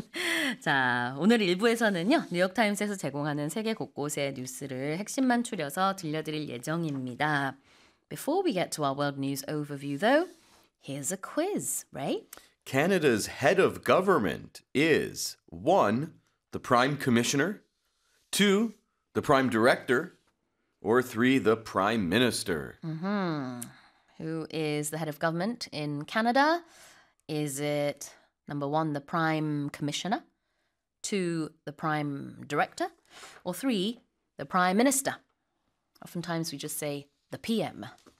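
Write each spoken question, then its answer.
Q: Who is the head of government in Canada?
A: 3: The Prime Minister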